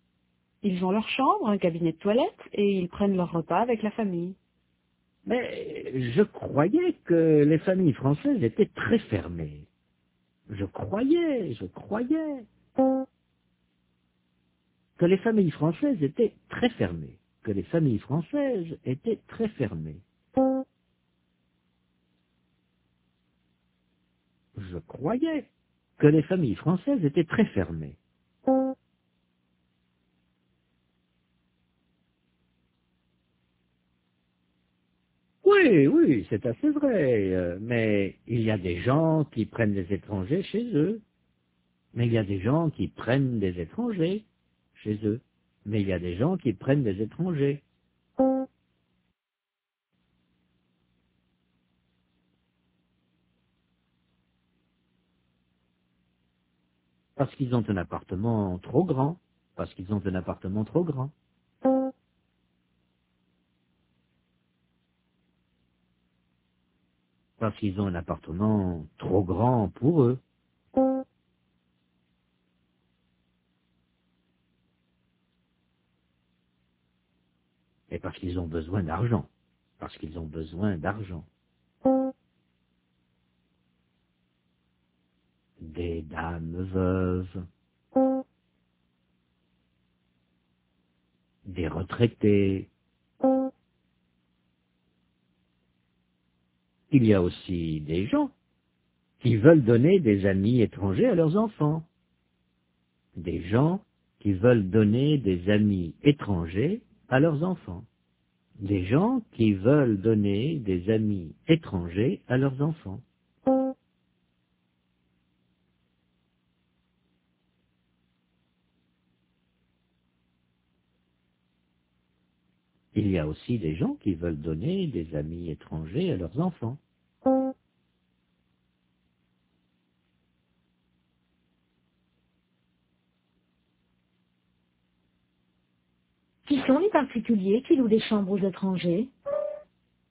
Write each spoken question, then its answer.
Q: Qui sont les particuliers qui louent des chambres aux étrangers?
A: Des dames veuves, des retraités.